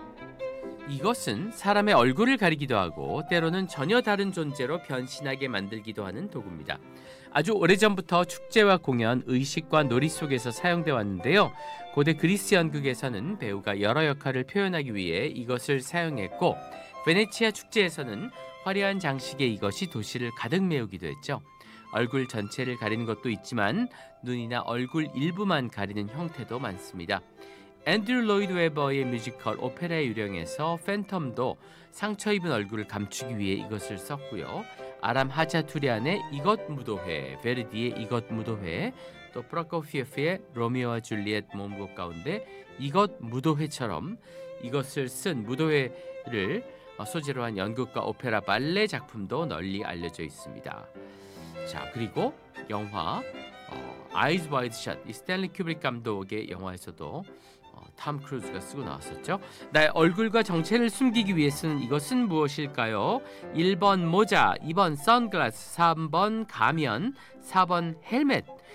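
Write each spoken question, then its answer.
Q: 나의 얼굴과 정체를 숨기기 위해 쓰는 이것은 무엇일까요?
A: 3번: 가면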